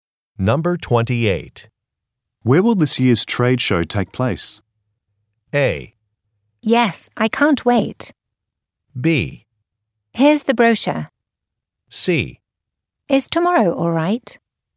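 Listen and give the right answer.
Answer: B: Here's the brochure.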